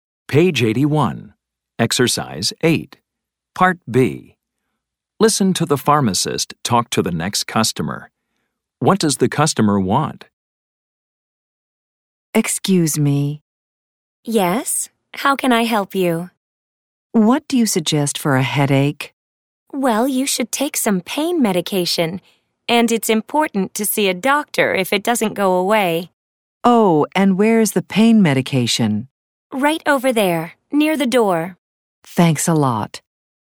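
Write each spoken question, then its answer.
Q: What does the customer want?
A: Something for a headache (pain medication)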